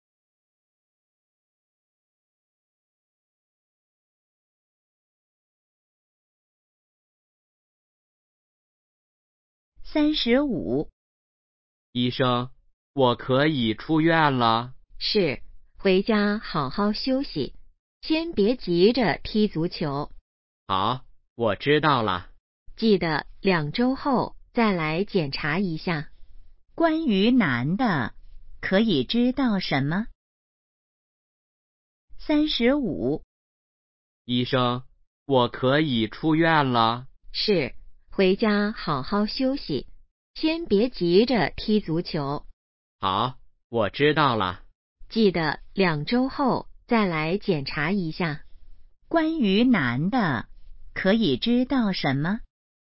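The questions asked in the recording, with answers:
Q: 关于男的,可以知道什么?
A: 他可以出院了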